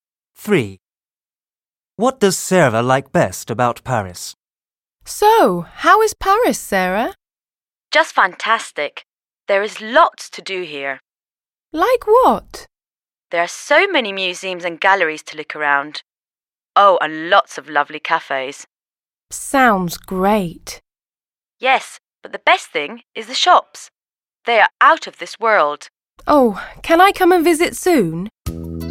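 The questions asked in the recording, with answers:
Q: What does Sarah like best about Paris?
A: The shops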